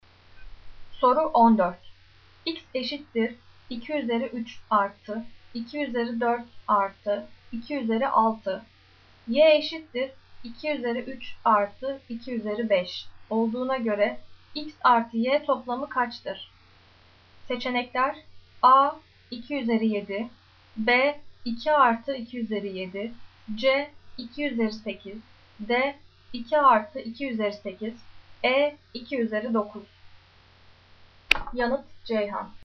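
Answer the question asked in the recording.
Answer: A: 2 üzeri 7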